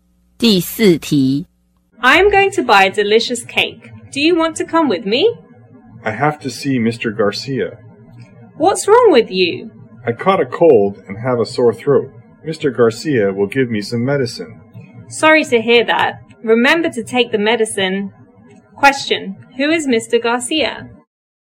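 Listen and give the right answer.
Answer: A doctor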